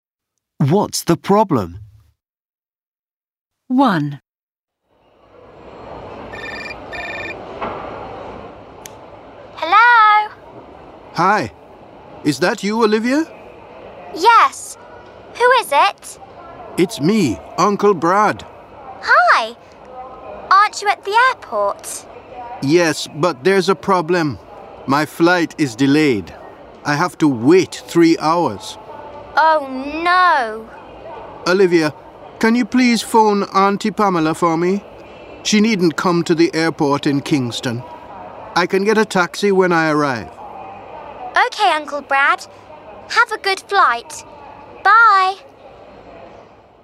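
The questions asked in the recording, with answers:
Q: What's the problem?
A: Uncle Brad's flight is delayed by 3 hours.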